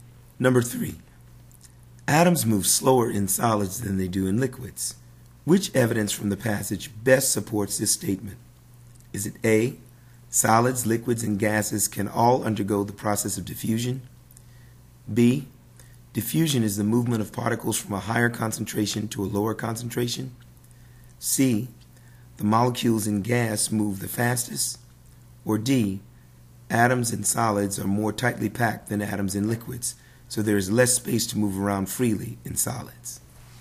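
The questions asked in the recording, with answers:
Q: Which evidence from the passage best supports this statement?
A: D: atoms in solids are more tightly packed than atoms in liquids, so there is less space to move around freely in solids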